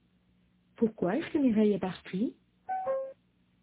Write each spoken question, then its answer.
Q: Pourquoi est-ce que Mireille est partie ?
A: Parce qu'elle est allée chez elle pour déjeuner.